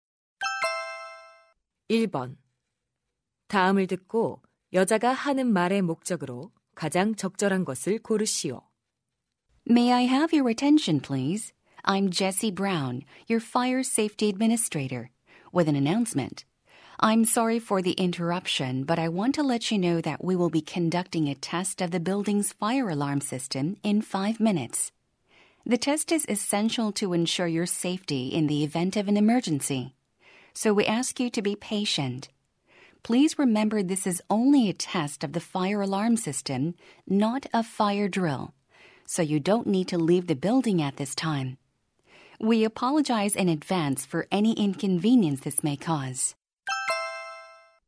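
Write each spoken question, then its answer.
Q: 다음을 듣고 여자가 하는 말의 목적으로 가장 적절한 것을 고르시오.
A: 화재경보 시스템 점검을 안내하려고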